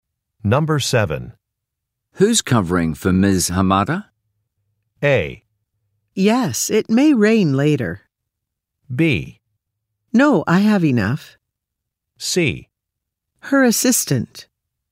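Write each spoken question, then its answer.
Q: Who's covering for Ms. Hamada?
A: C: Her assistant.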